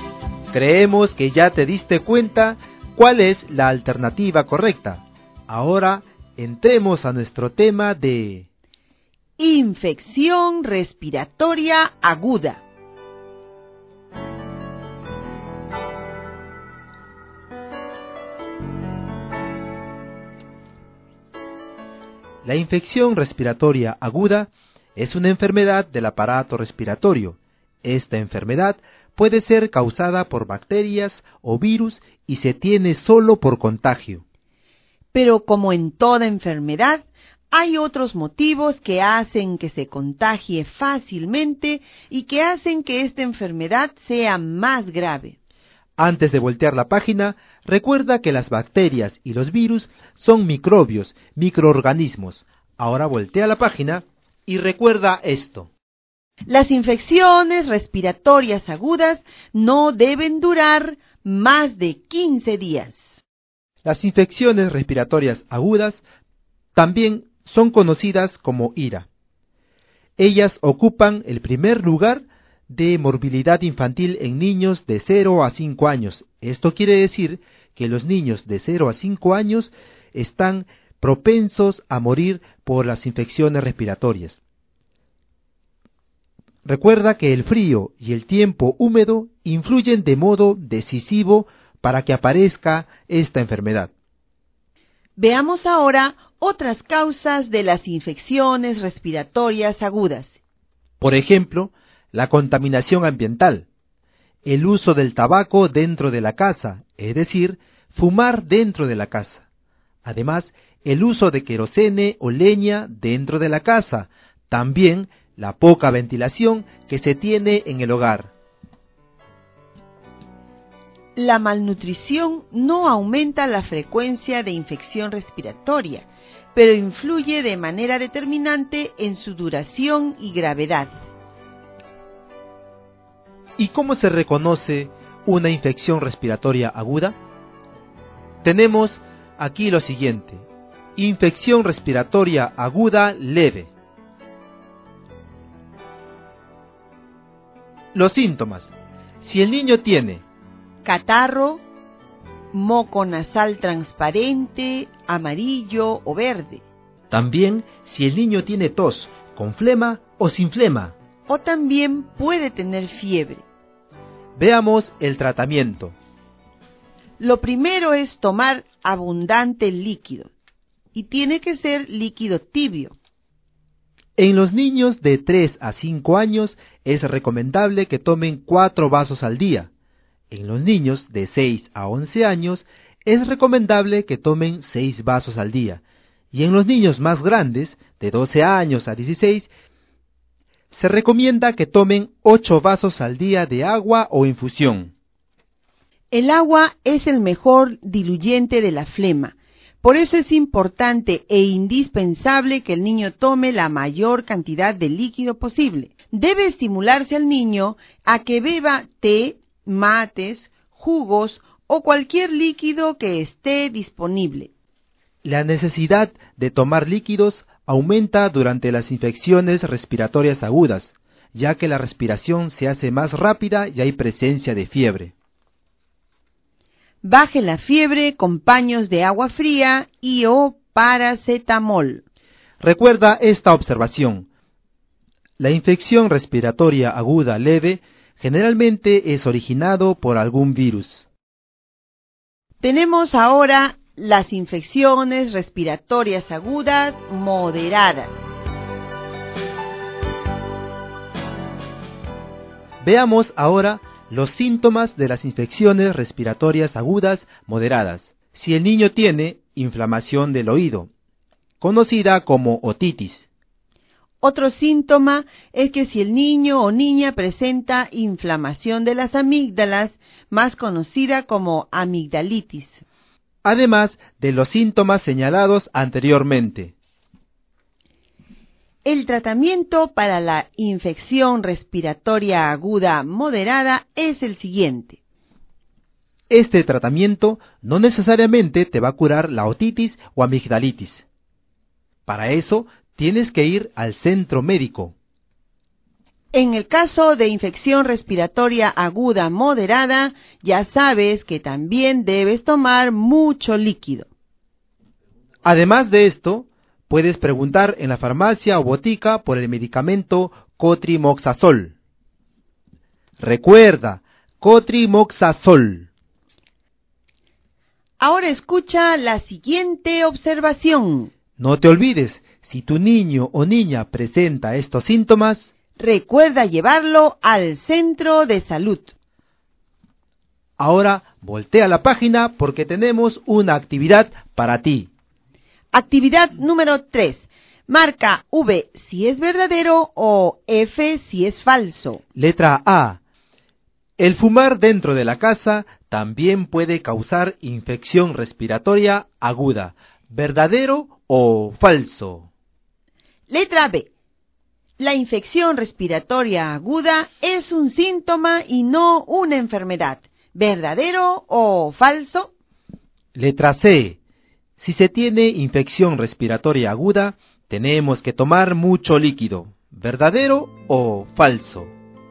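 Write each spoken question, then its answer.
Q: Letra A. El fumar dentro de la casa también puede causar infección respiratoria aguda.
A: Verdadero

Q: Letra B. La infección respiratoria aguda es un síntoma y no una enfermedad.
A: Falso

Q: Letra C. Si se tiene infección respiratoria aguda, tenemos que tomar mucho líquido.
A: Verdadero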